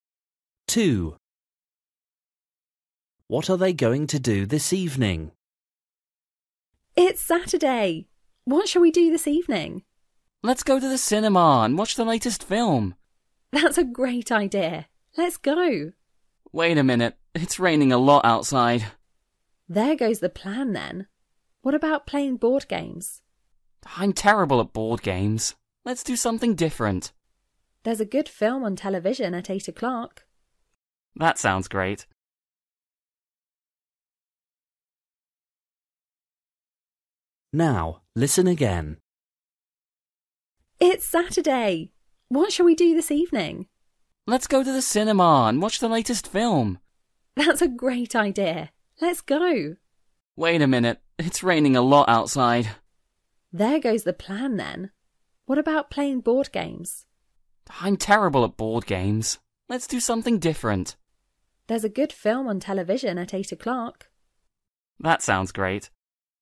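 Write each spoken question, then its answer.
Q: What are they going to do this evening?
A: Watch a film on television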